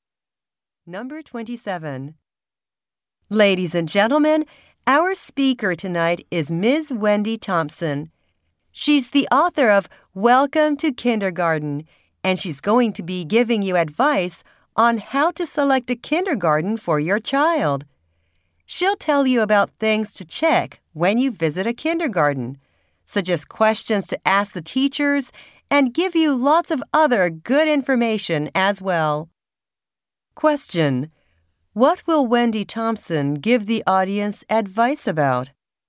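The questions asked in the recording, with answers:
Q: What will Wendy Thompson give the audience advice about?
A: How to choose a kindergarten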